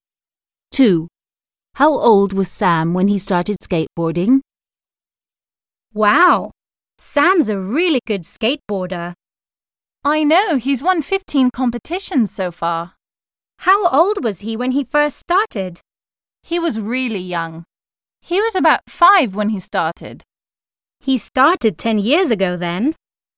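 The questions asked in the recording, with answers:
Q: How old was Sam when he started skateboarding?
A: about 5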